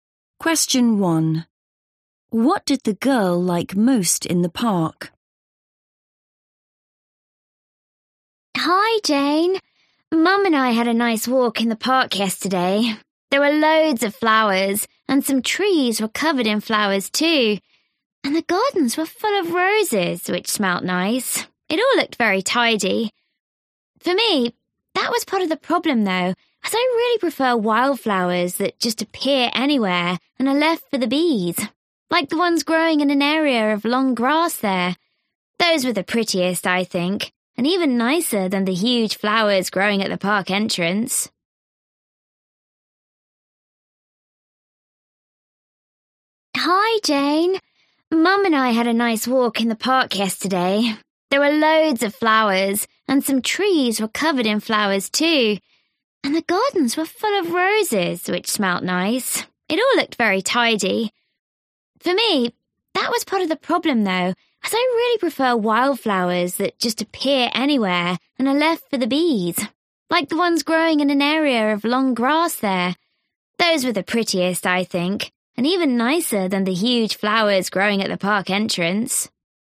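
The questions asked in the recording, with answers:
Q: What did the girl like most in the park?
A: the wildflowers in the long grass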